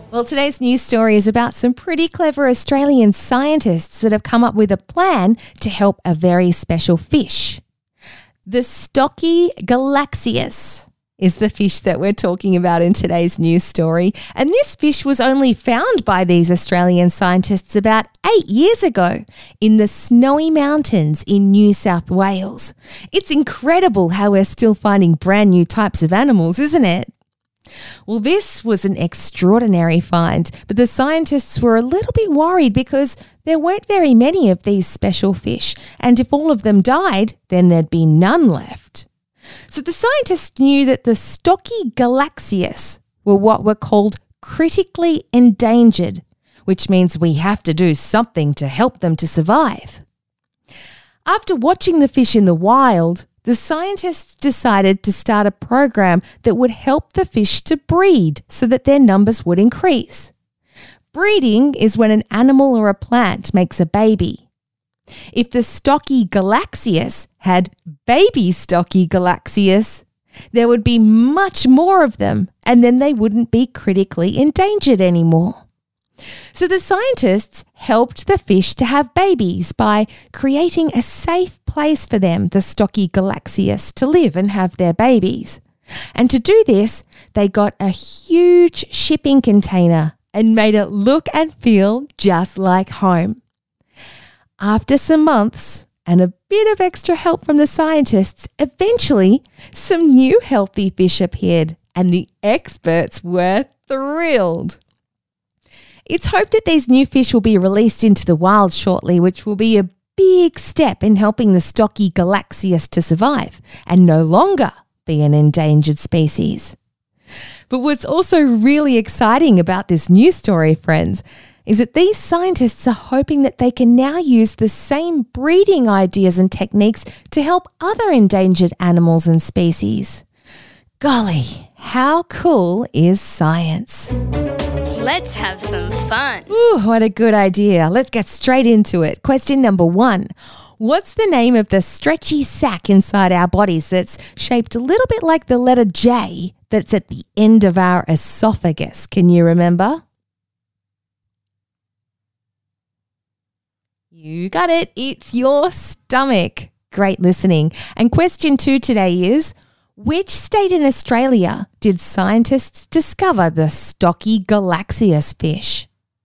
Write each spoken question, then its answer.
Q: which state in Australia did scientists discover the Stocky Galaxias fish?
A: But the answer we're looking for was New South Wales.